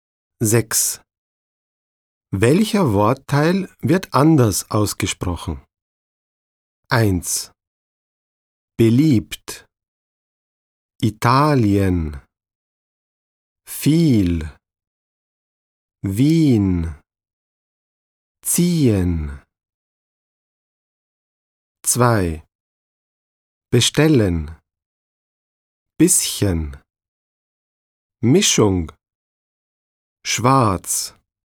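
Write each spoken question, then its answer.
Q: Welcher Wortteil wird anders ausgesprochen?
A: Italien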